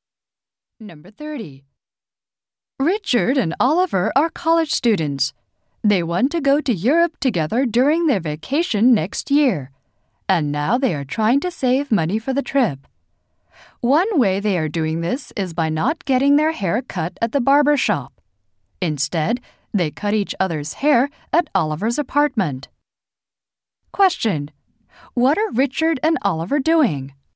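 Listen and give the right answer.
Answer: Cutting each other's hair to save money for a trip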